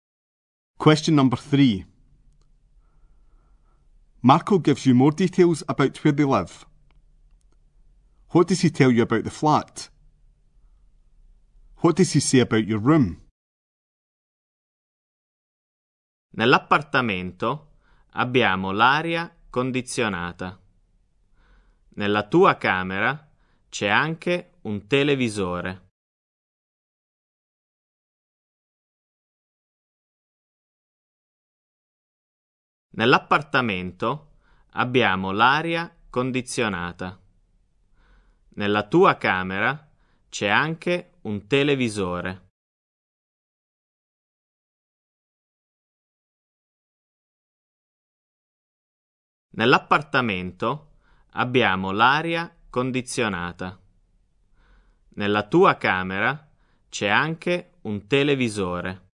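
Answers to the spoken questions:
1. It has air conditioning
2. There is a television in it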